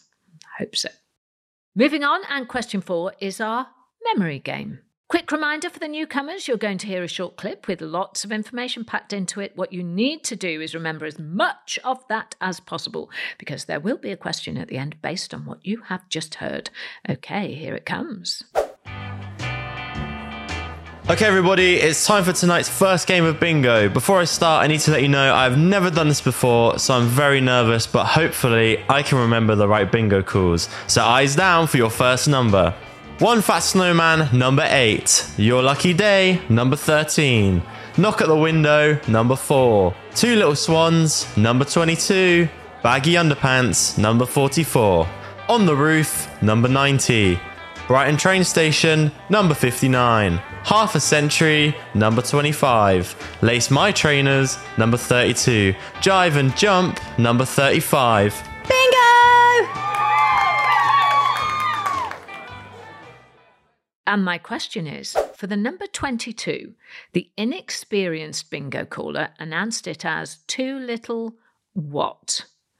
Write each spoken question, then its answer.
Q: And my question is for the number 22, the inexperienced bingo caller announced it as too little what?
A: And the answer is swans.